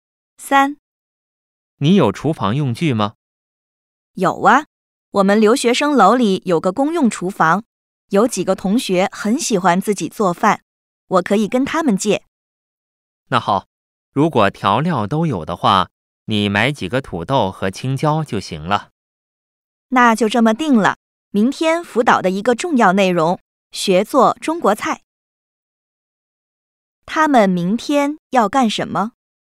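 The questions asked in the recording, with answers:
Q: 他们明天要干什么?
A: 学做中国菜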